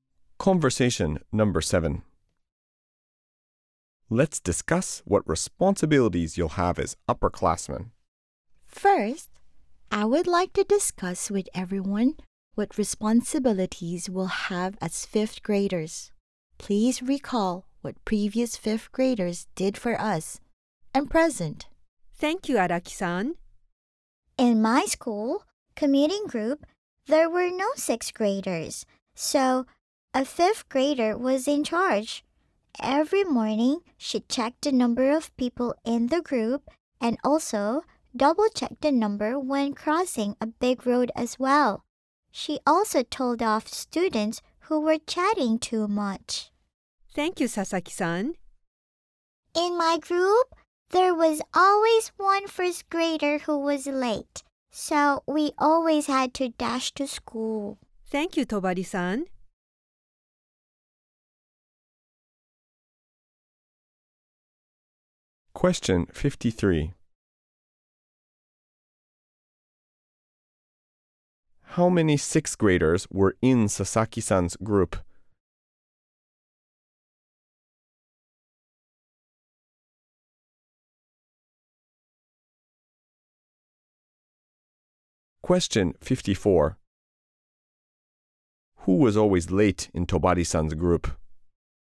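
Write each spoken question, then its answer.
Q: How many sixth graders were in Sasaki-san's group?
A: None (zero)

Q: Who was always late in Tobari-san's group?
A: A first grader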